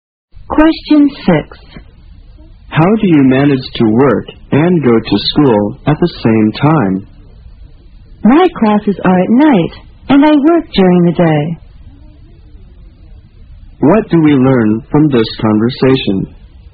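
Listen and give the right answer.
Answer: The speaker works during the day and takes classes at night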